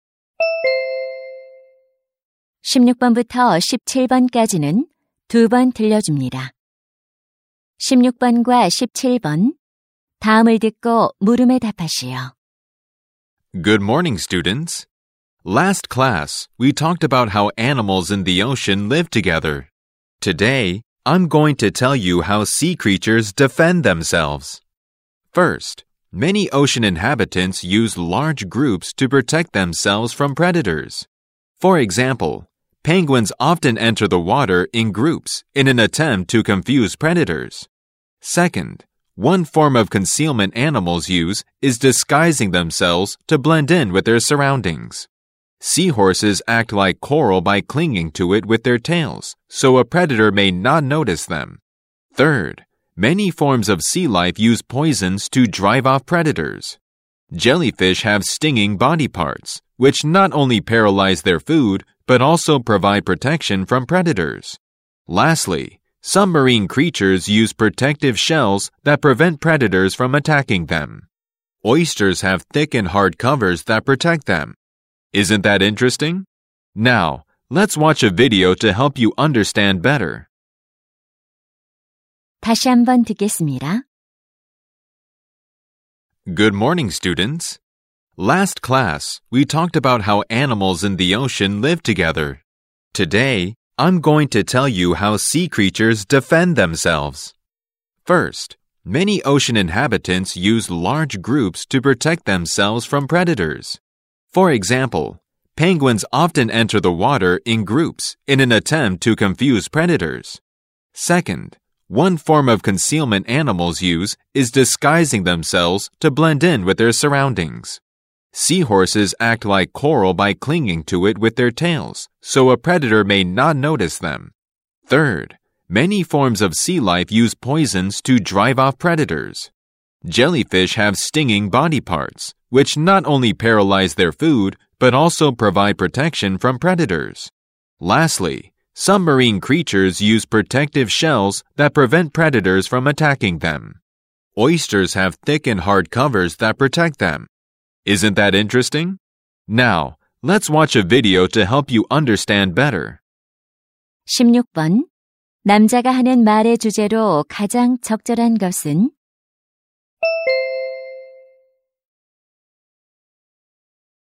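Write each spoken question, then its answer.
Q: 남자가 하는 말의 주제로 가장 적절한 것은?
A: 해양 생물이 스스로를 방어하는 방법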